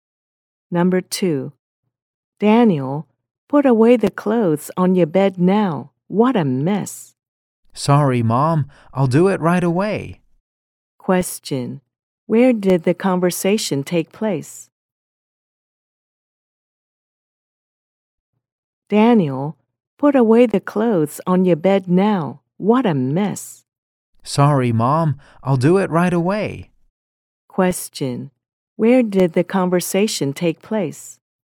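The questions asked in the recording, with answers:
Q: Question, where did the conversation take place?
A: At home (in Daniel's bedroom)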